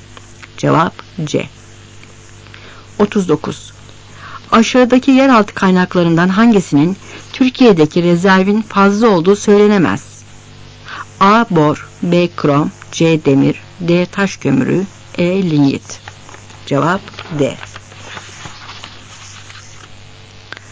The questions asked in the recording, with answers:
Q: Aşağıdaki yeraltı kaynaklarından hangisinin Türkiye'deki rezervin fazla olduğu söylenemez?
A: Cevap D.